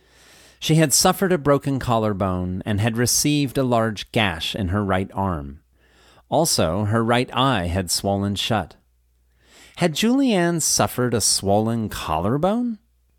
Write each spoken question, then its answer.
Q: Had Julianne suffered a swollen collarbone?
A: No, she had suffered a broken collarbone.